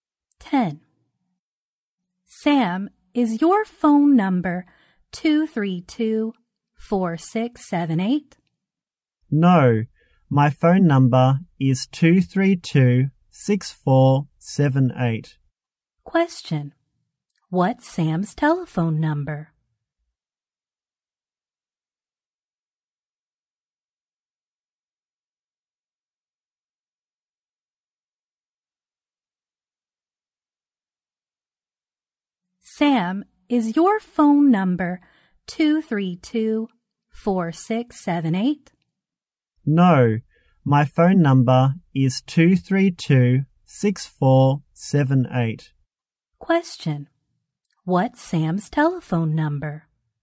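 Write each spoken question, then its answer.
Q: What's Sam's telephone number?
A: 232-6478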